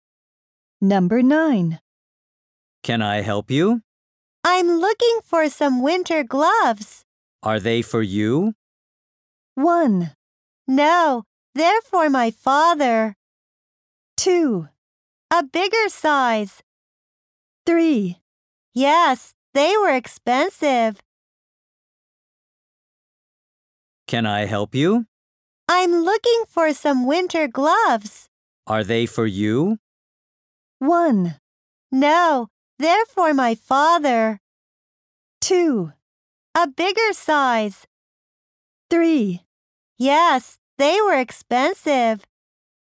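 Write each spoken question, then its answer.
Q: Are they for you?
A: 1: No, they're for my father.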